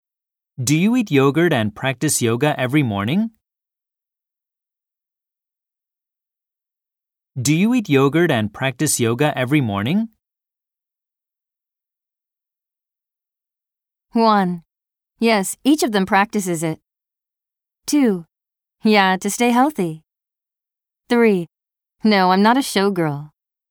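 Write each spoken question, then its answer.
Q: Do you eat yogurt and practice yoga every morning?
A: 2: Yeah, to stay healthy.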